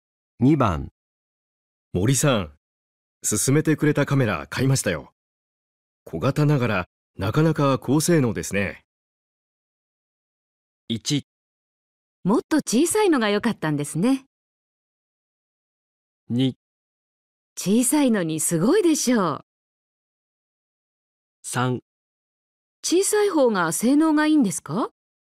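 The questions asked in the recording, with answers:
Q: 森さん、勧めてくれたカメラ買いましたよ。小型ながらなかなか高性能ですね。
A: 2: 小さいのにすごいでしょう。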